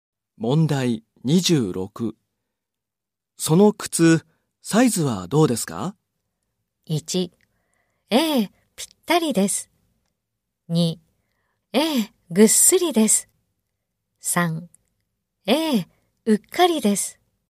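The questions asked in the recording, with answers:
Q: その靴、サイズはどうですか?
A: 2: ええ、ぴったりです。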